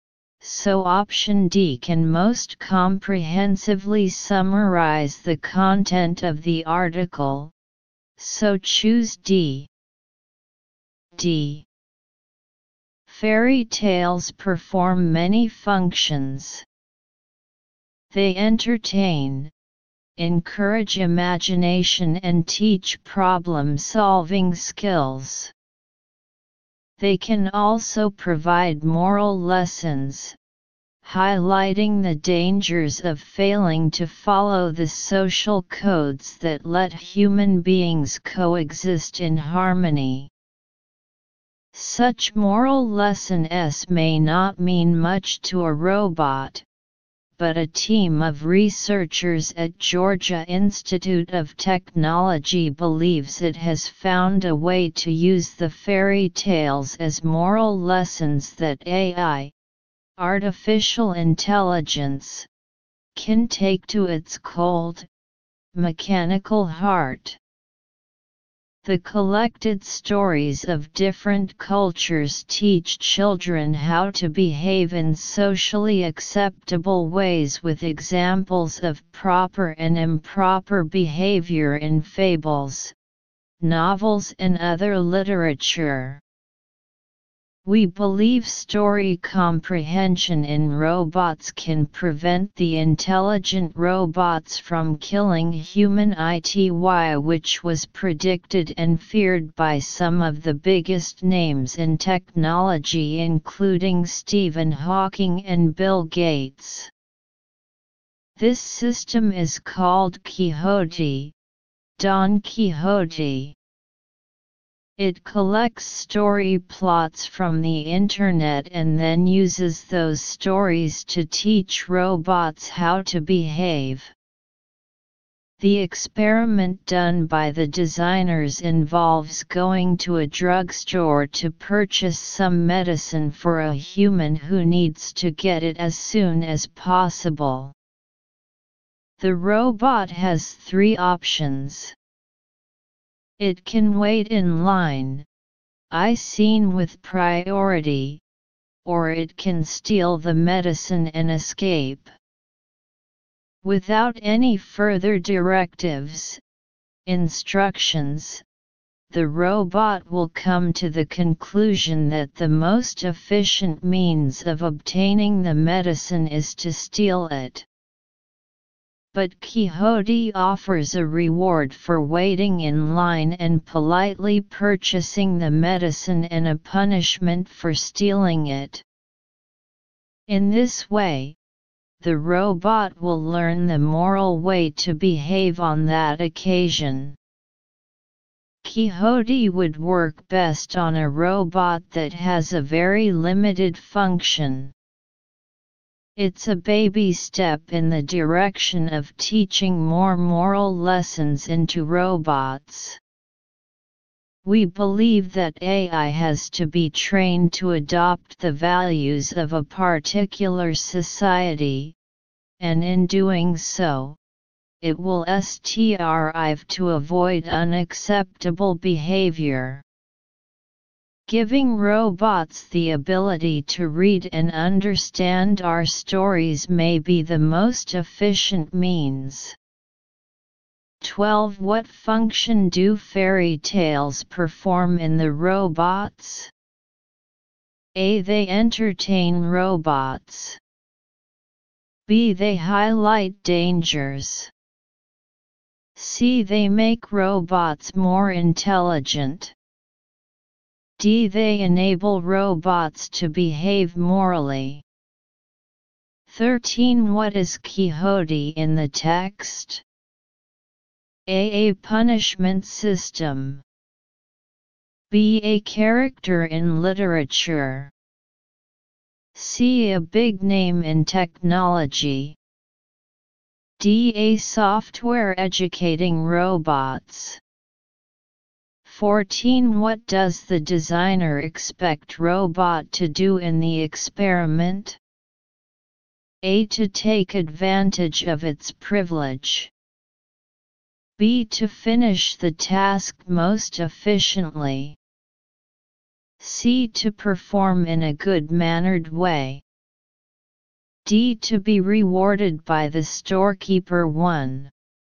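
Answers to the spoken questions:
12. D: They enable robots to behave morally.
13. D: A software educating robots.
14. C: To perform in a good-mannered way.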